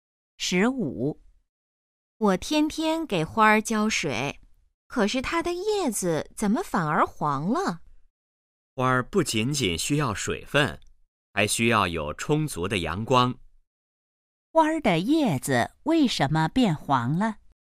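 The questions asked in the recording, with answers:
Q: 花儿的叶子为什么变黄了?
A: 缺少阳光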